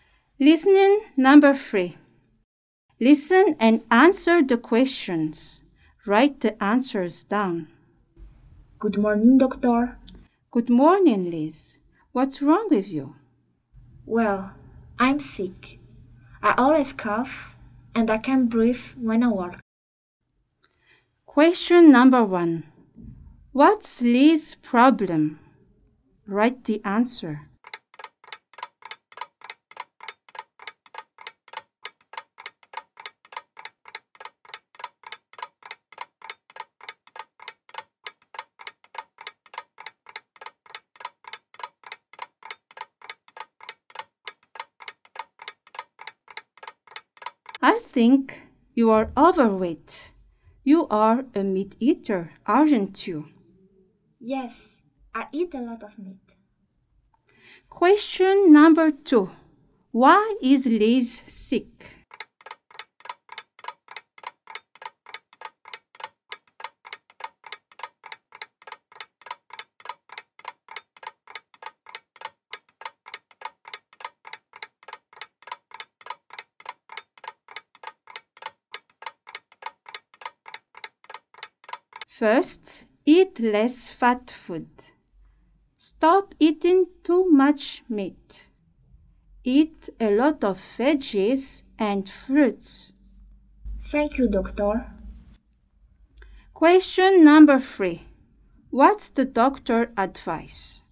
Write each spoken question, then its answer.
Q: What's Liz's problem?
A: Liz's problem is she always coughs and she can't even breathe well when she works.

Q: Why is Liz sick?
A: Liz is sick because she eats too much meat.

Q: What's the doctor's advice?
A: The doctor's advice is to eat less fat food, to stop eating too much meat, and to eat a lot of veggies and fruits.